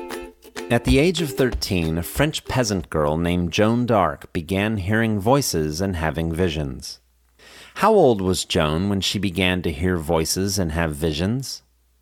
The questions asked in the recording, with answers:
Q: How old was Joan when she began to hear voices and have visions?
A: At the age of 13, Joan began hearing voices and having visions.